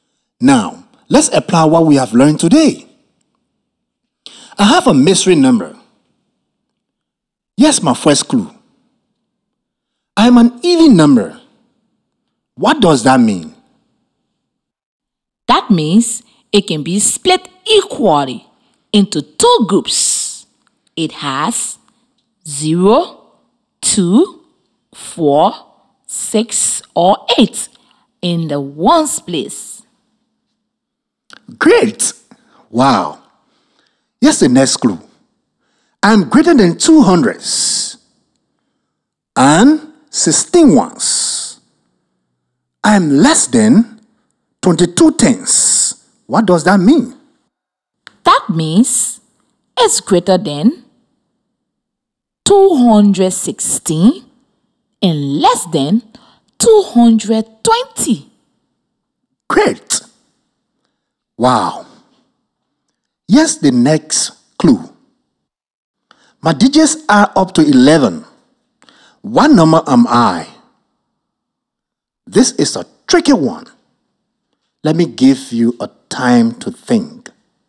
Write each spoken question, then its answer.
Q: My digits are up to 11. What number am I?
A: 218. It's even.